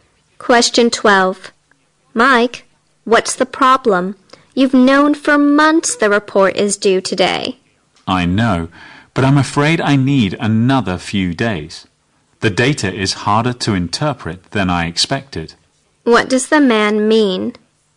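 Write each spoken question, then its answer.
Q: What does the man mean?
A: He needs a few more days to finish the report.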